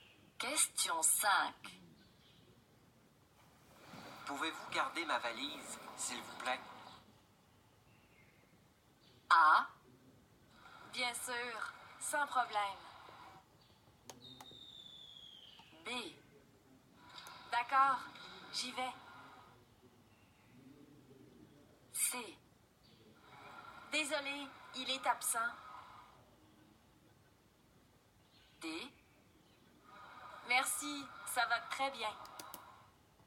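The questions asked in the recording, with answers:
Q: Pouvez-vous garder ma valise, s'il vous plaît?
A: A: Bien sûr, sans problème.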